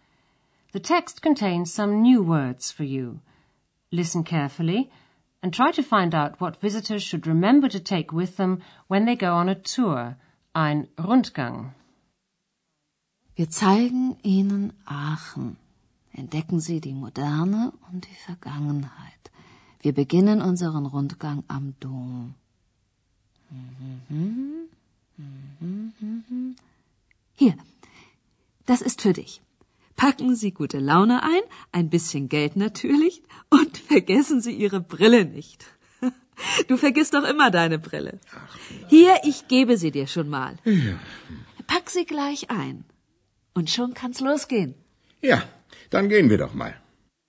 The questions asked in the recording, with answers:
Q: Listen carefully and try to find out what visitors should remember to take with them when they go on a tour, ein Rundgang.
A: Visitors are reminded not to forget their glasses